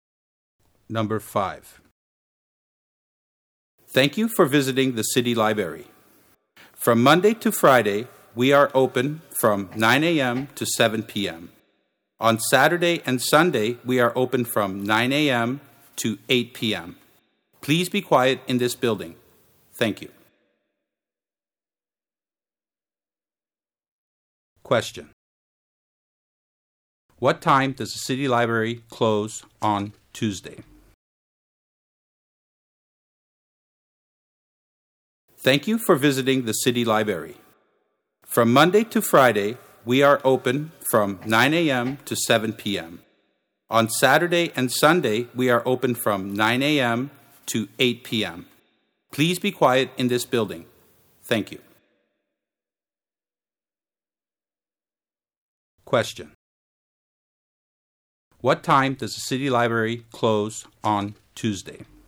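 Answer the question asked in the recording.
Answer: 7 p.m.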